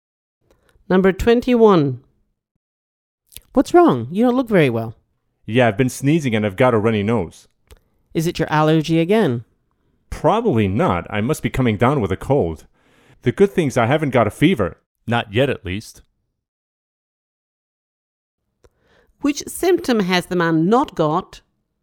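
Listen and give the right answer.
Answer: A fever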